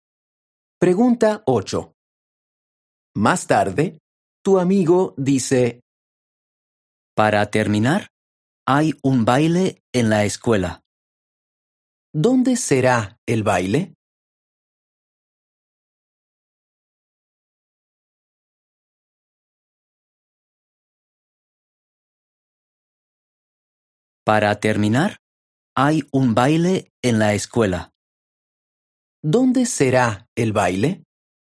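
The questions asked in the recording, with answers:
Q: ¿Dónde será el baile?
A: En la escuela.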